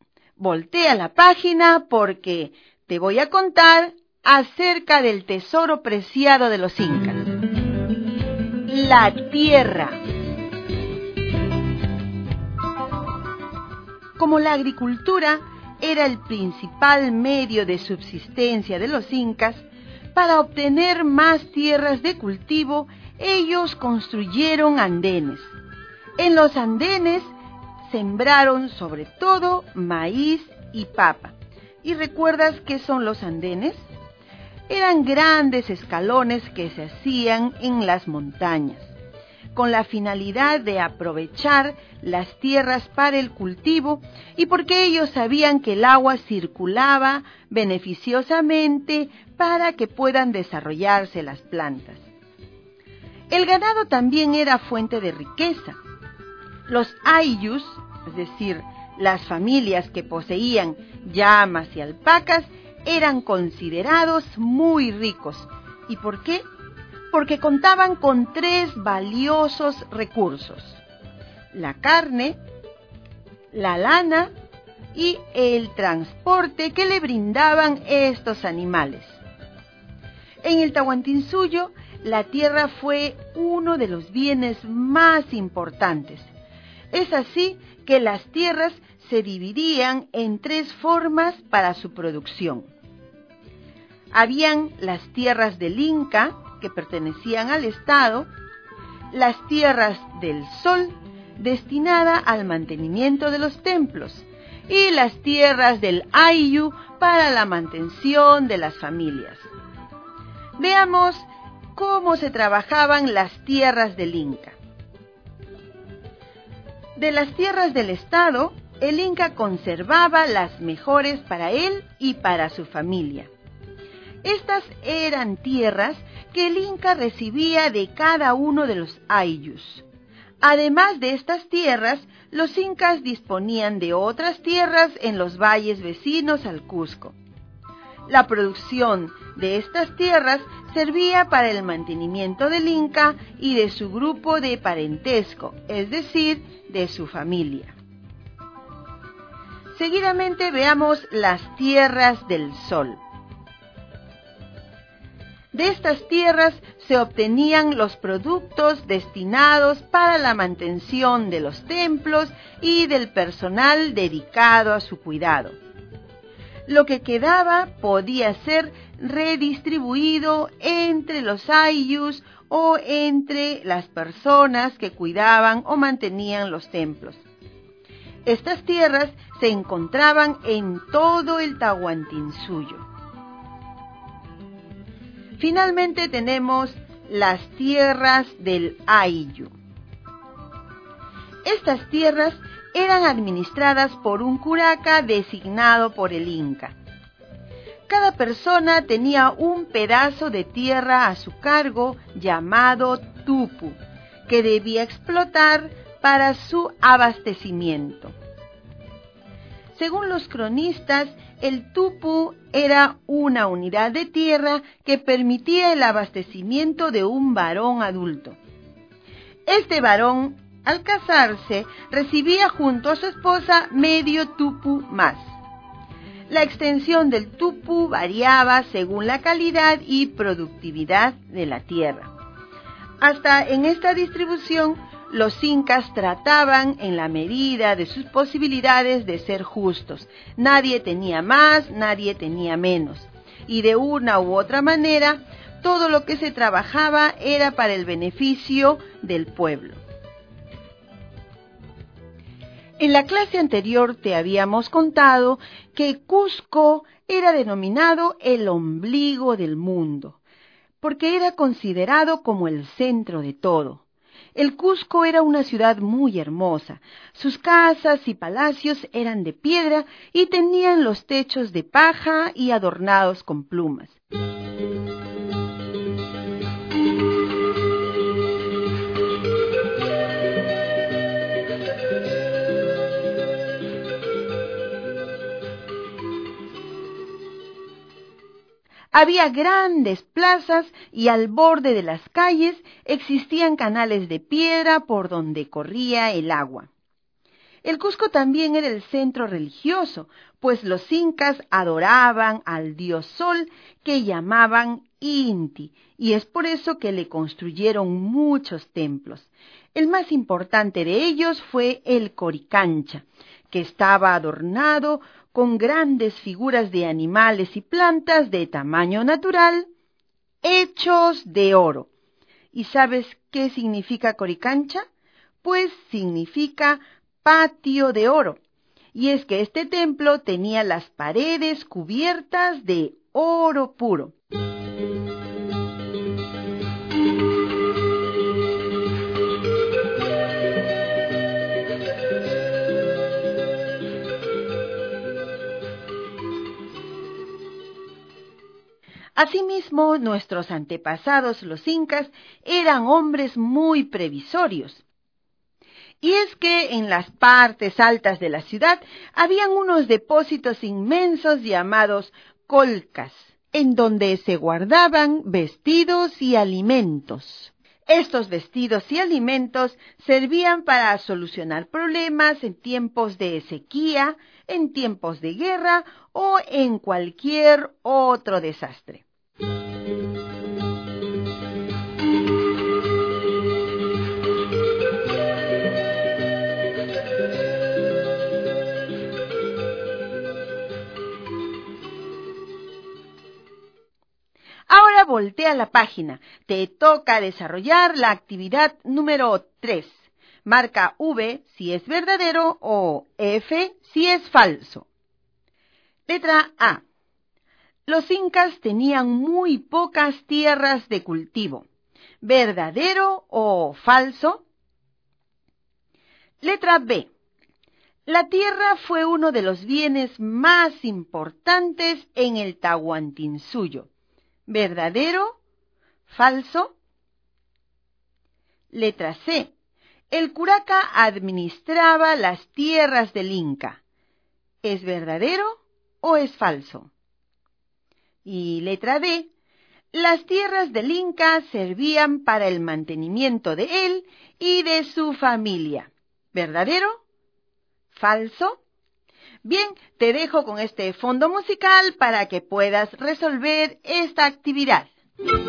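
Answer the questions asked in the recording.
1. Falso
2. Verdadero
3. Falso
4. Verdadero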